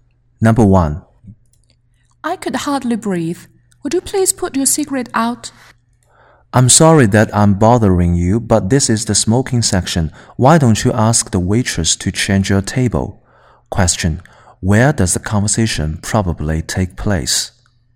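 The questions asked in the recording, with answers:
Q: Where does the conversation probably take place?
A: In a restaurant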